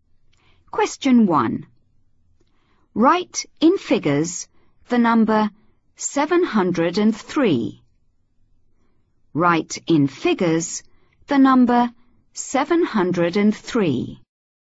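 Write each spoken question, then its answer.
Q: Write in figures the number 703.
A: 703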